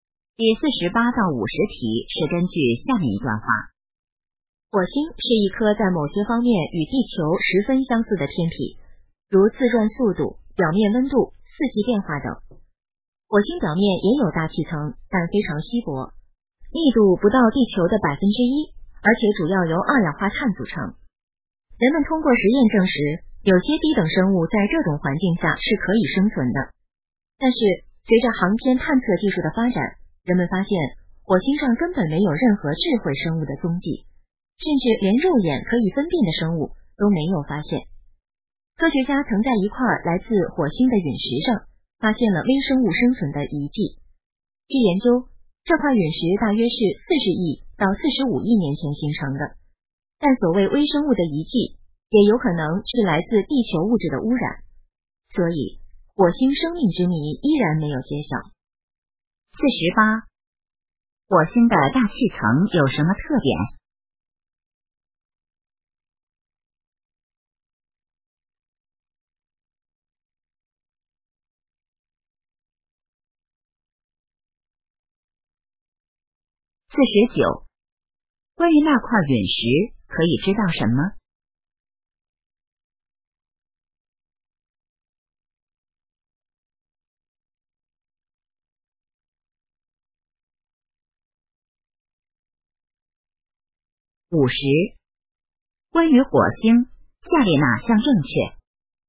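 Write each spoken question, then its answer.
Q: 火星的大气层有什么特点?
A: 非常稀薄,主要由二氧化碳组成

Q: 关于那块陨石,可以知道什么?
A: 大约形成于40亿到45亿年前,上面有疑似微生物的遗迹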